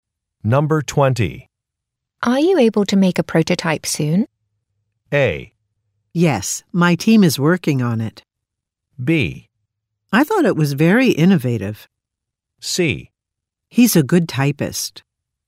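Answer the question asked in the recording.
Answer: A: Yes, my team is working on it.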